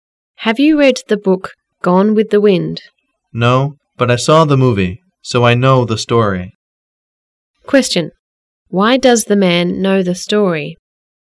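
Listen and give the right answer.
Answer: He saw the movie.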